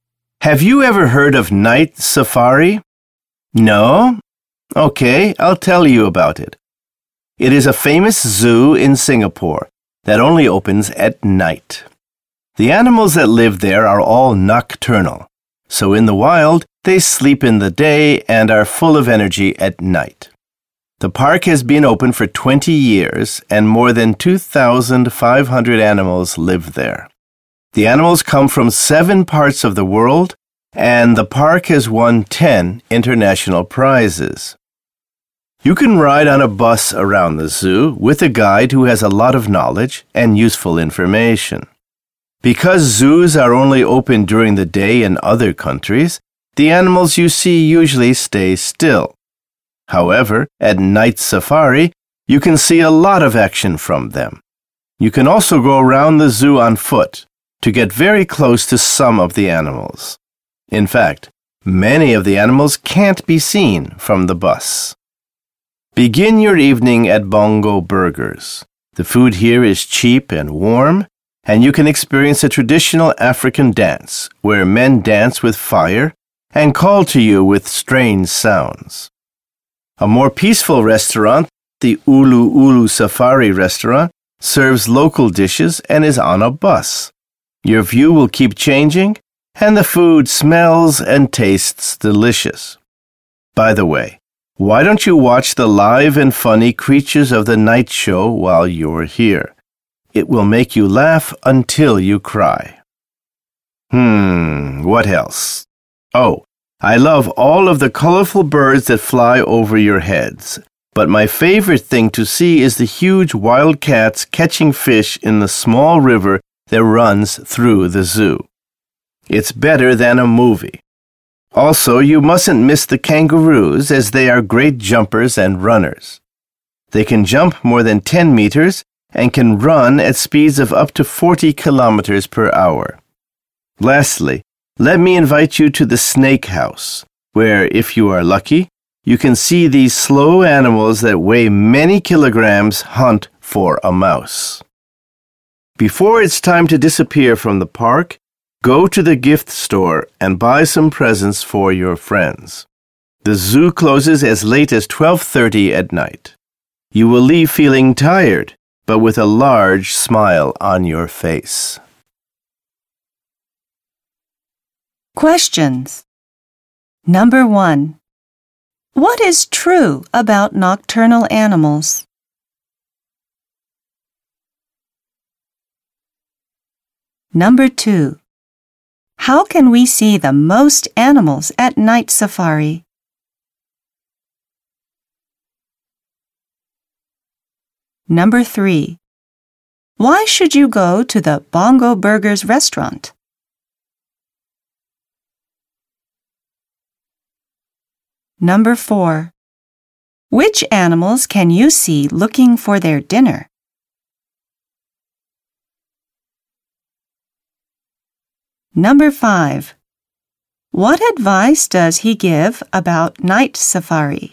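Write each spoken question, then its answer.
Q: What is true about nocturnal animals?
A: They sleep in the day and are full of energy at night.

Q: How can we see the most animals at night safari?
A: By going around the zoo on foot.

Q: Why should you go to the Bongo Burgers restaurant?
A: The food is cheap and warm, and you can see a traditional African fire dance.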